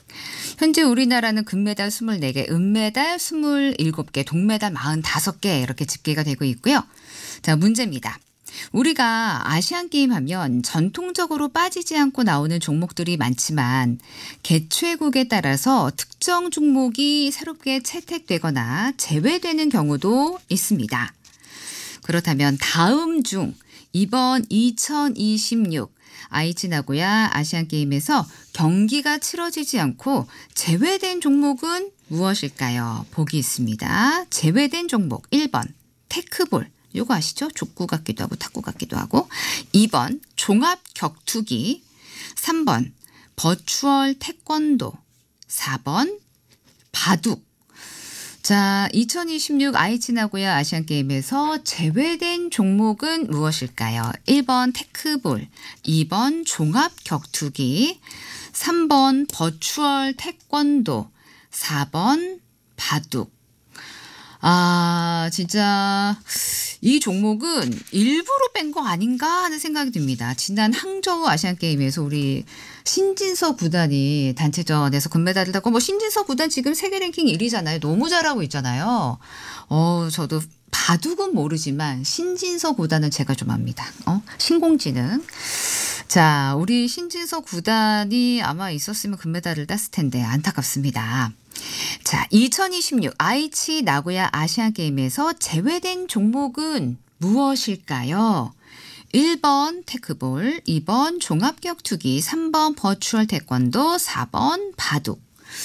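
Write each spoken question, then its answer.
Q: 자, 2026 아이치 나고야 아시안게임에서 제외된 종목은 무엇일까요?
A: 4: 바둑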